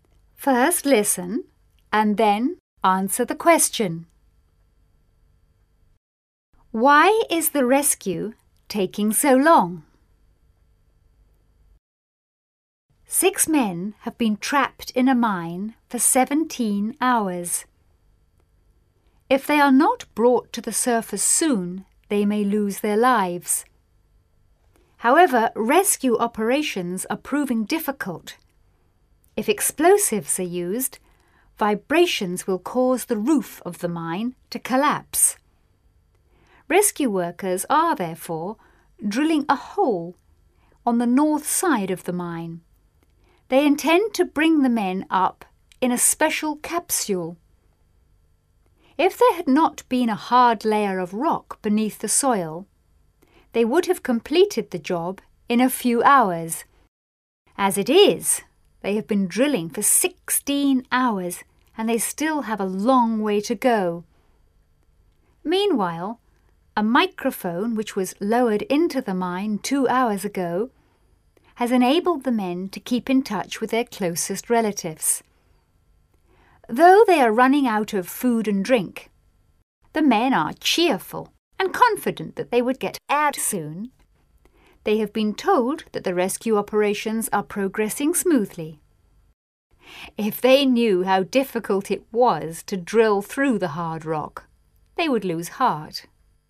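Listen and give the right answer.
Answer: Because there is a hard layer of rock beneath the soil, so drilling is slow (explosives can't be used because the roof might collapse).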